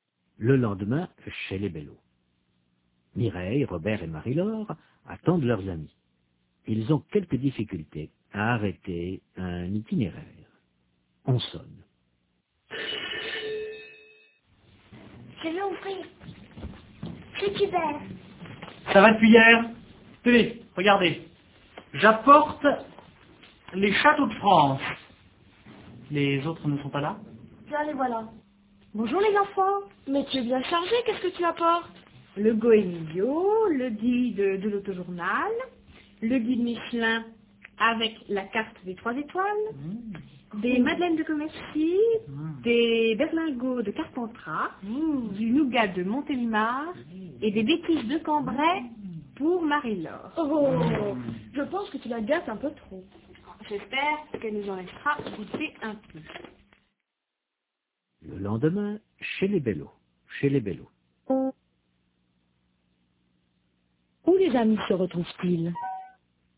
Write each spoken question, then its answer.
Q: Où les amis se retrouvent-ils ?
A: Chez les Bello.